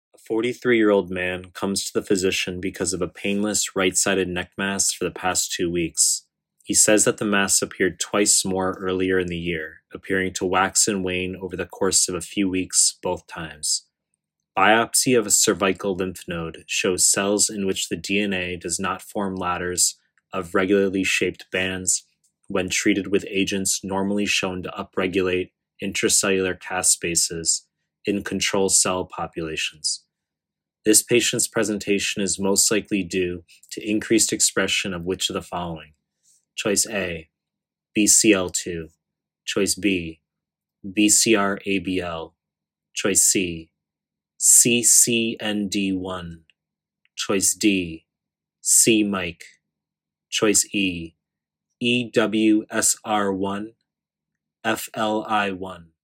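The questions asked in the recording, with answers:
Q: This patient's presentation is most likely due to increased expression of which of the following?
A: A: BCL2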